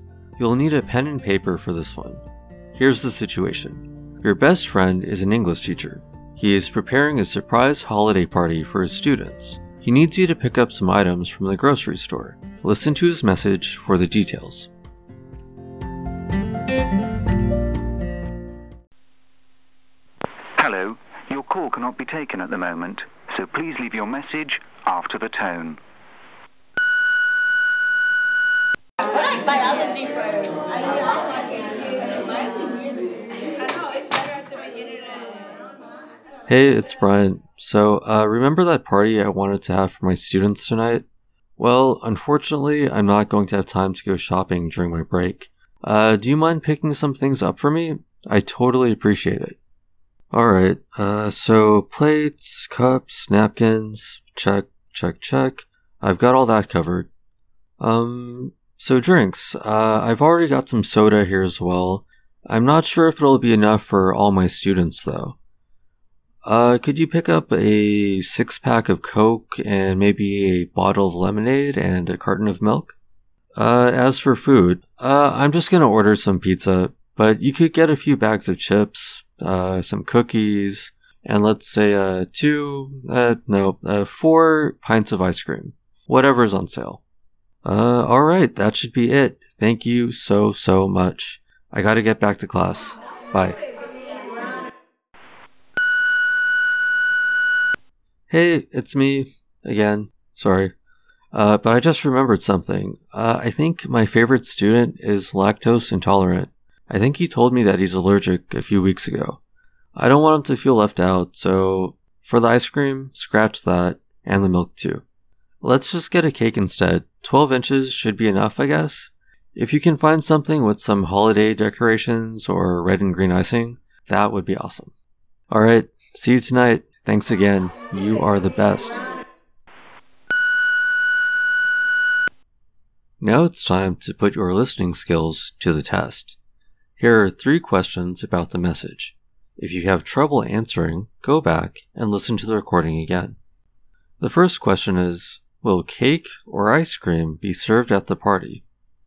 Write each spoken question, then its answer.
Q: Will cake or ice cream be served at the party?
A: Cake will be served.